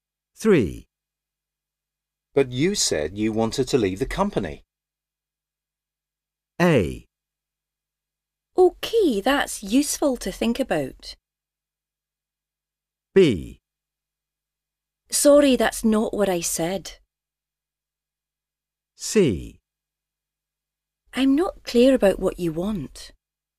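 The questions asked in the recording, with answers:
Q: But you said you wanted to leave the company.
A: B: Sorry, that's not what I said.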